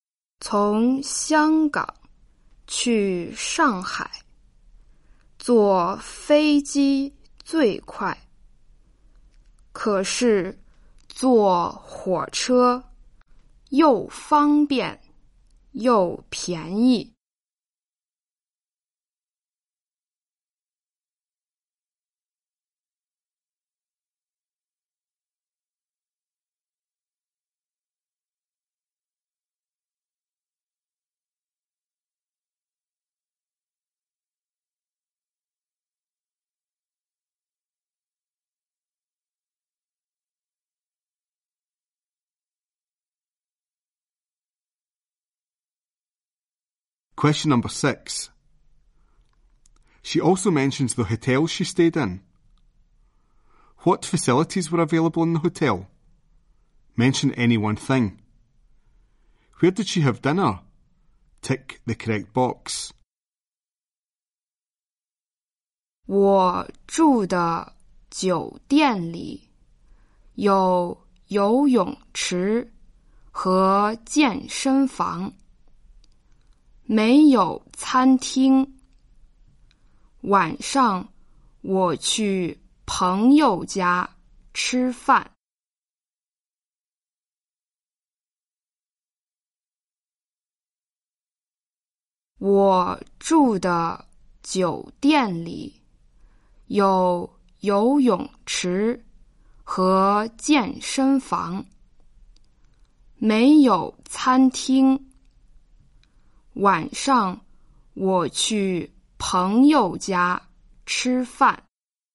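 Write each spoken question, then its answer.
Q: What facilities were available in the hotel?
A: A swimming pool and a gym

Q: Where did she have dinner?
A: At a friend's house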